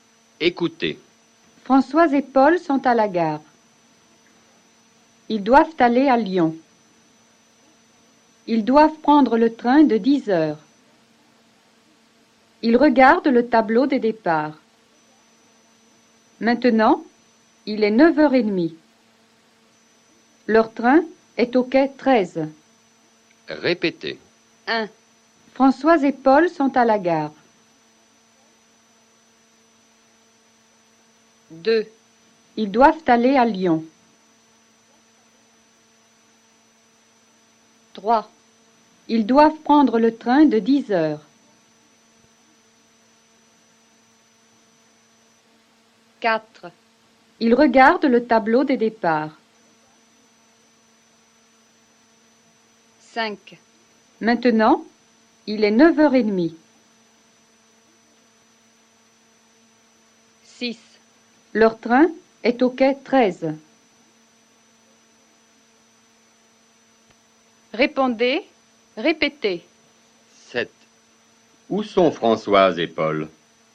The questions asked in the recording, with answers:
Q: Où sont Françoise et Paul?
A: Françoise et Paul sont à la gare.